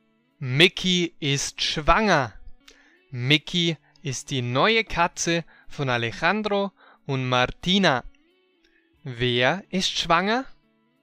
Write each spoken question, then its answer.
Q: Wer ist schwanger?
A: Mickey.